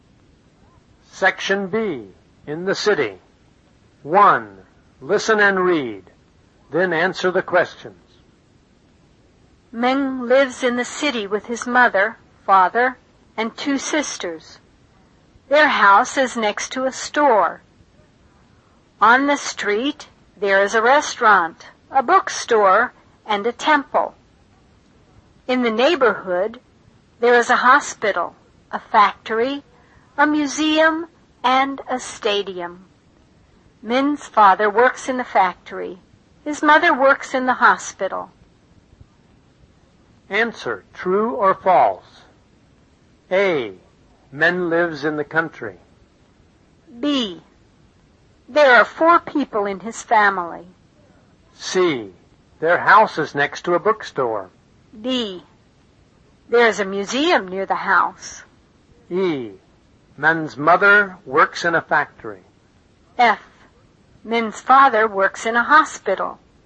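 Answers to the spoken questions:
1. False
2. False
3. False
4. True
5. False
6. False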